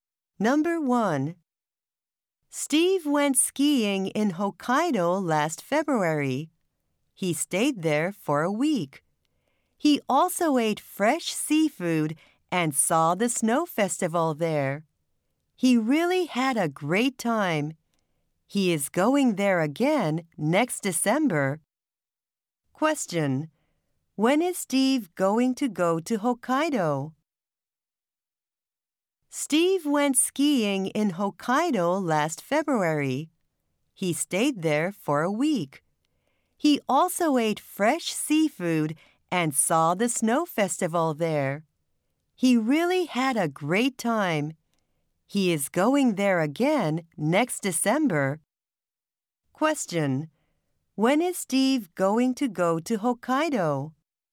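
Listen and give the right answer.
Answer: Next December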